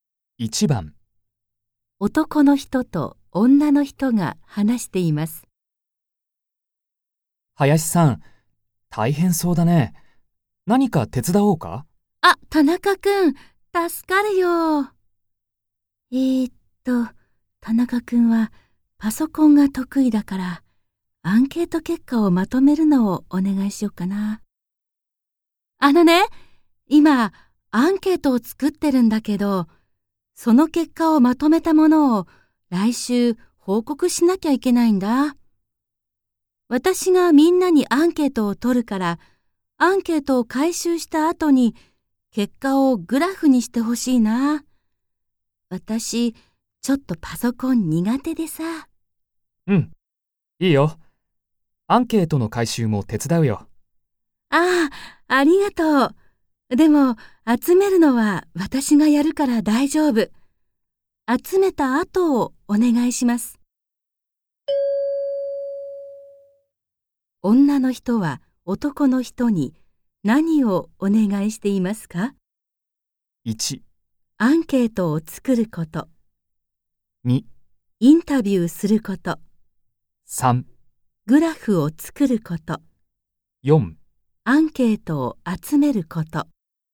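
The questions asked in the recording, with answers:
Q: 女の人は男の人に何をお願いしていますか ?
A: 3: グラフを作ること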